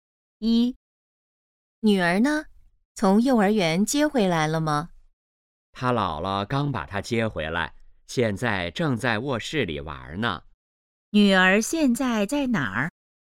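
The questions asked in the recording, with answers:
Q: 女儿现在在哪儿?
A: 在卧室里玩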